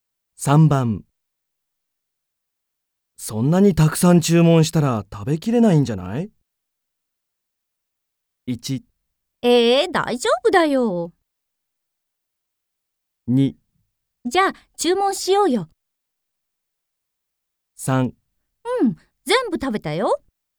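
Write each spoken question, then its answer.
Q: そんなにたくさん注文したら食べきれないんじゃない?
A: 1: 大丈夫だよ。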